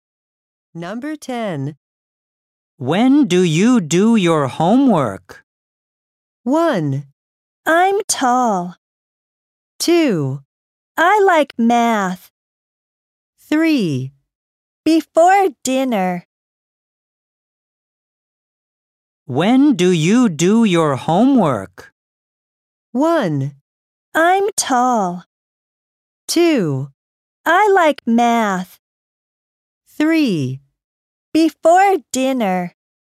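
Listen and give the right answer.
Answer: 3: Before dinner.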